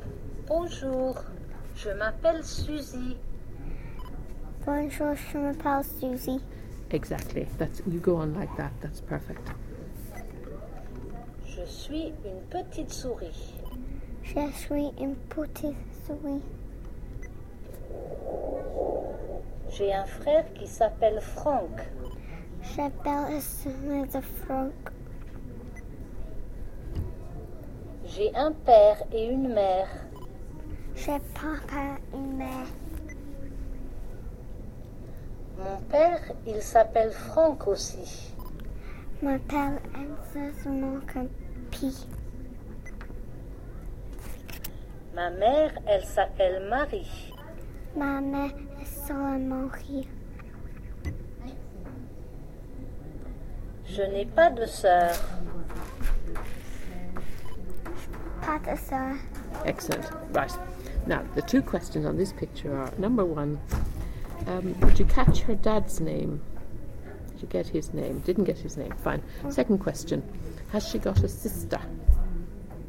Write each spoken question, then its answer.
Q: Has she got a sister?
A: No.